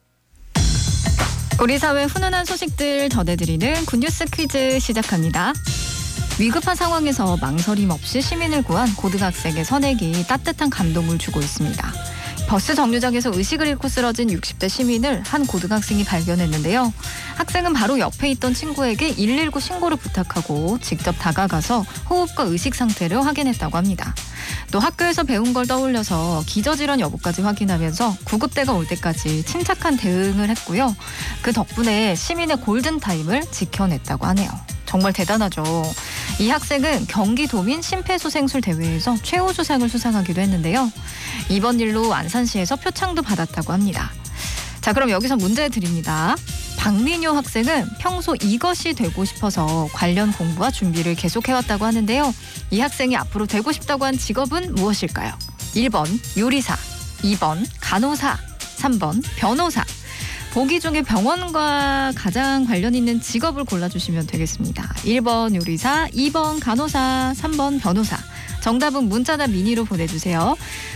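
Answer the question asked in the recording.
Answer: 2번: 간호사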